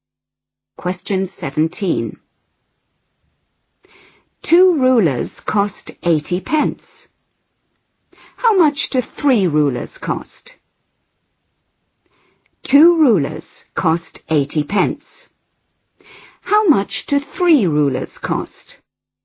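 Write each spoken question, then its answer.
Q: How much do 3 rulers cost?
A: £1.20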